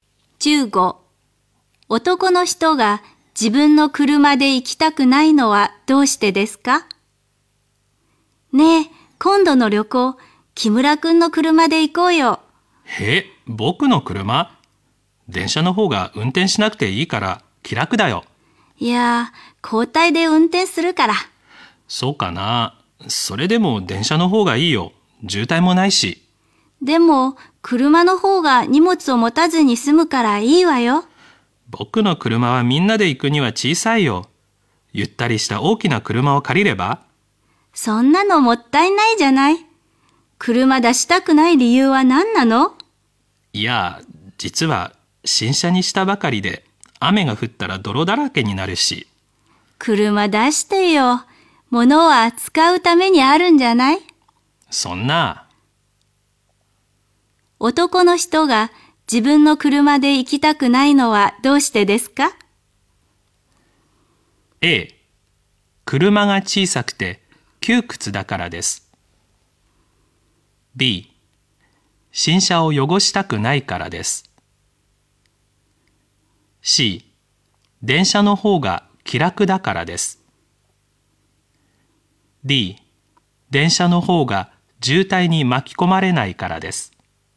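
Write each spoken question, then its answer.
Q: 男の人が自分の車で行きたくないのはどうしてですか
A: B: 新車を汚したくないからです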